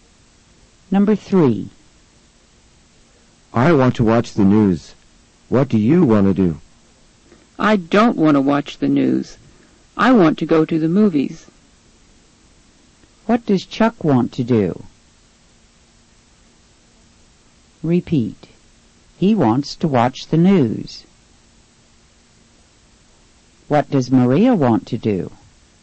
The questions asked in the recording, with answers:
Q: What does Maria want to do?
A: She wants to go to the movies.